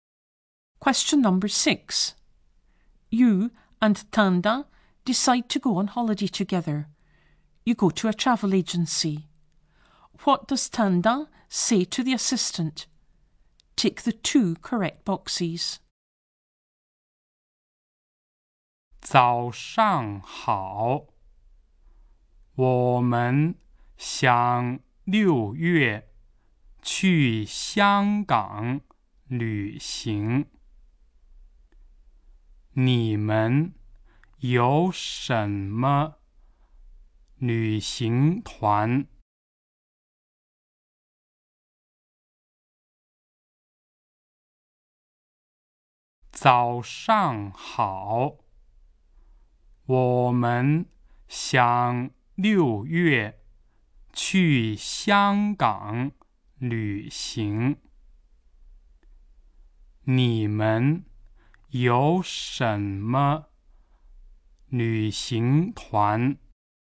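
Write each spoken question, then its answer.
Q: What does Tanda say to the assistant?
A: They want to go to Hong Kong in June and asks what tours they have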